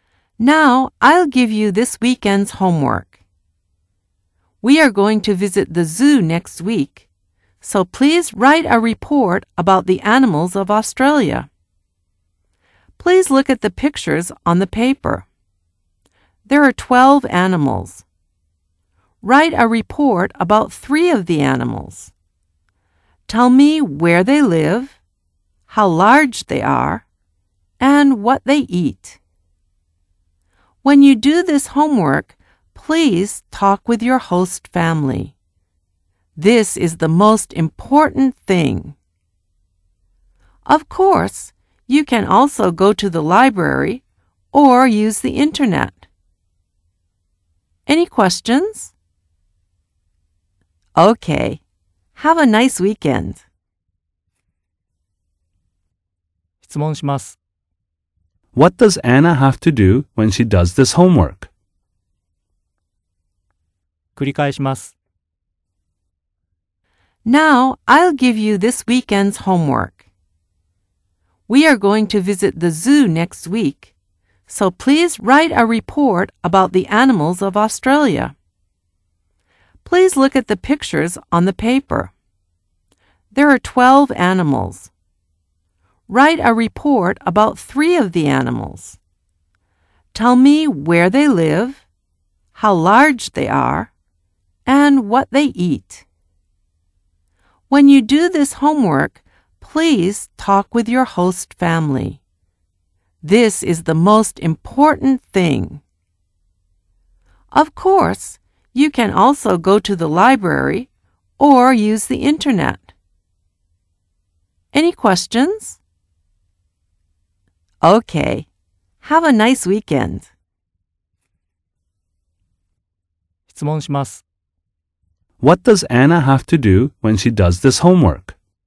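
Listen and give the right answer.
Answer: She has to talk with her host family.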